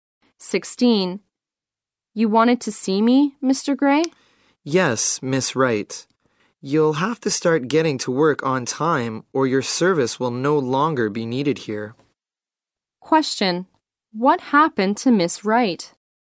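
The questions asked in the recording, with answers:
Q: What happened to Miss Wright?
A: She was warned she'd lose her job if she kept coming to work late.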